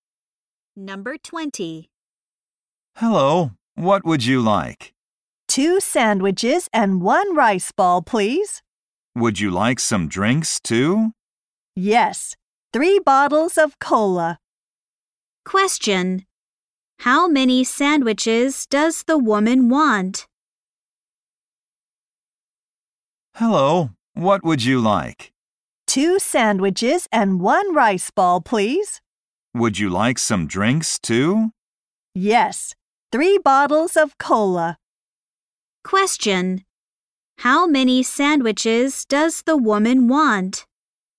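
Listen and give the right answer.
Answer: Two.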